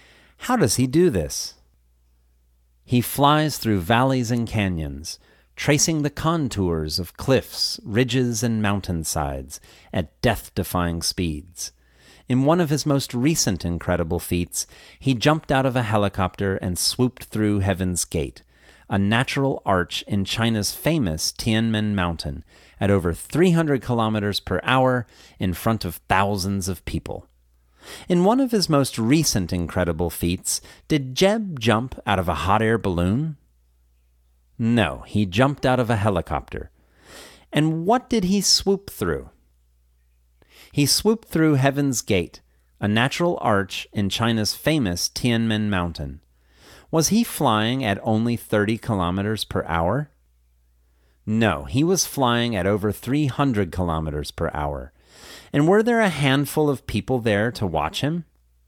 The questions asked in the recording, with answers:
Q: In one of his most recent incredible feats, did Jeb jump out of a hot air balloon?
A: No, he jumped out of a helicopter.

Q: And what did he swoop through?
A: He swooped through Heaven's Gate, a natural arch in China's famous Tianmen Mountain.

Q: And were there a handful of people there to watch him?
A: There were thousands of people there to watch him.